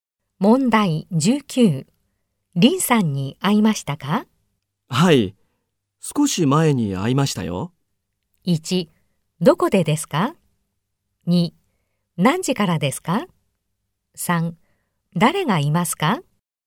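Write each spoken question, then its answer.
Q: 林さんに会いましたか?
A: 3: どこでですか?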